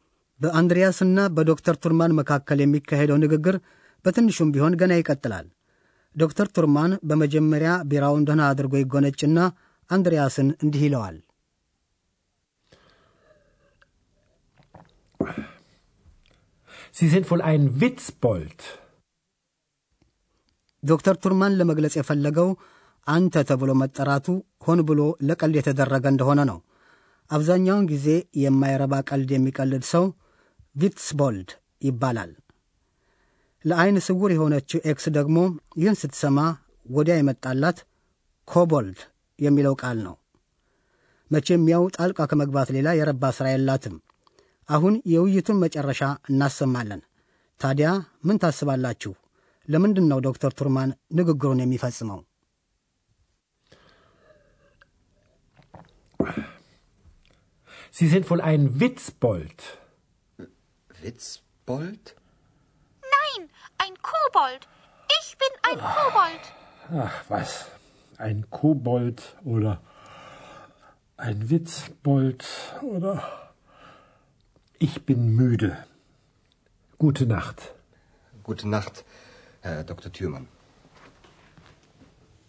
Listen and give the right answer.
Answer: ዶክተር ቱርማን ንግግሩን ለምን እንደፈጸመ ተረዳችሁ። ስለ ደከመው ነው።